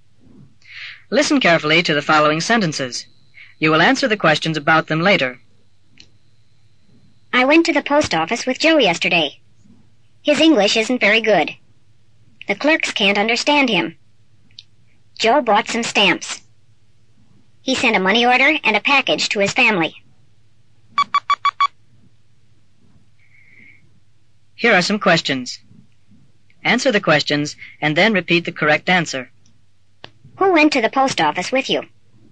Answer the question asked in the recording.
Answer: Joe went to the post office with me.